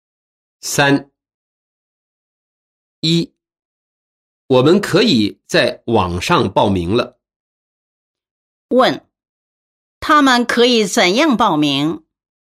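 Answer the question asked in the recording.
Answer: 在网上报名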